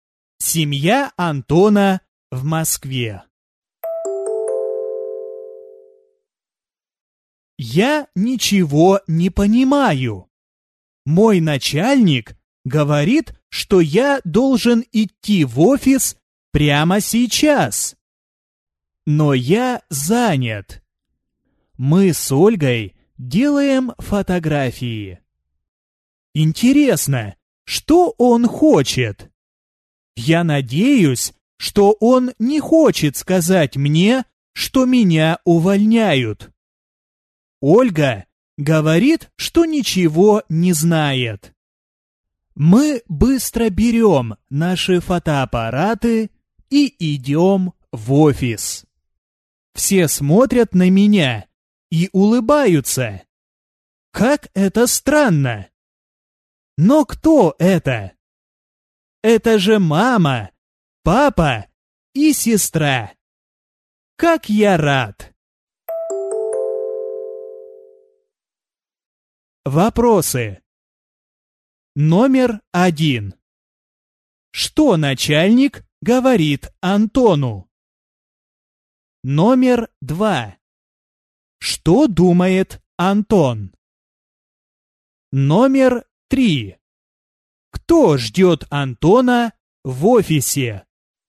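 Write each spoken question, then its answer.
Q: Что начальник говорит Антону?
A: Что он должен идти в офис прямо сейчас

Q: Кто ждет Антона в офисе?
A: Мама, папа и сестра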